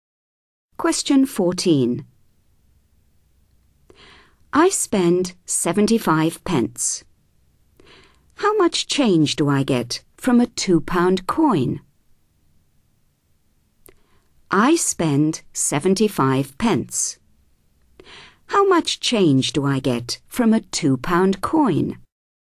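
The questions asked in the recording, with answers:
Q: I spend 75 pence. How much change do I get from a £2 coin?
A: £1.25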